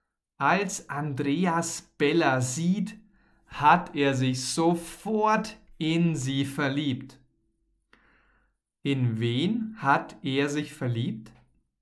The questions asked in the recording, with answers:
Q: In wen hat er sich verliebt?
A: In Bella natürlich. Er hat sich in Bella verliebt.